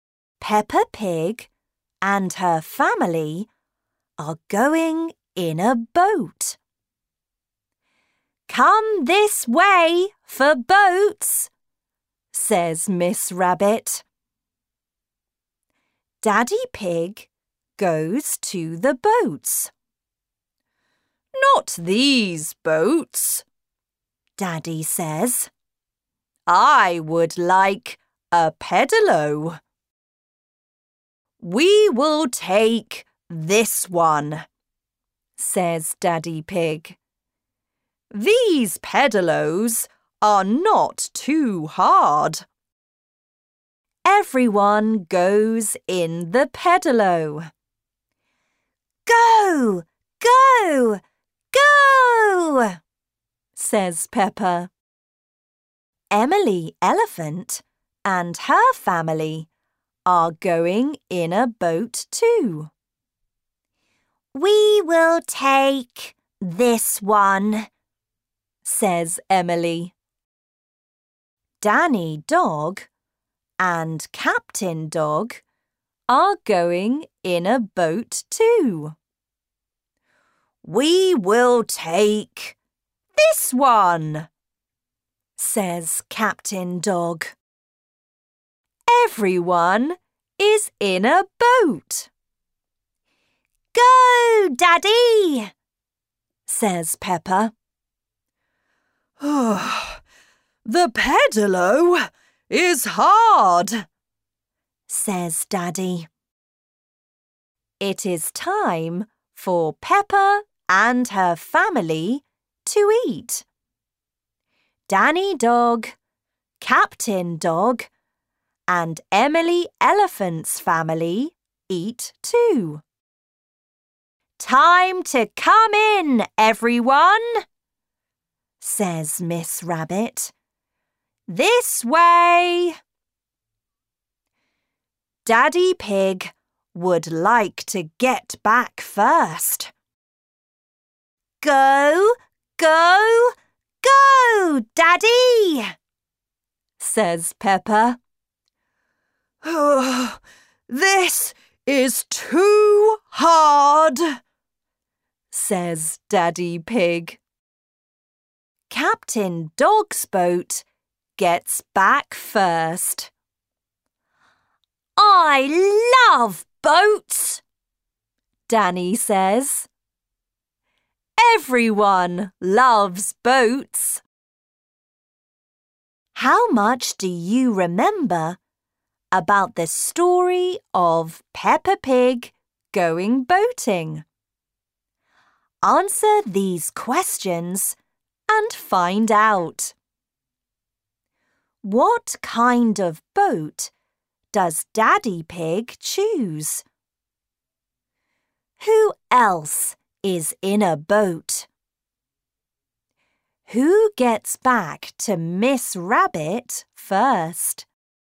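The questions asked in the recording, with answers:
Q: What kind of boat does Daddy Pig choose?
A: A pedalo

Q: Who else is in a boat?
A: Emily Elephant and her family, Danny Dog and Captain Dog

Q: Who gets back to Miss Rabbit first?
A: Captain Dog's boat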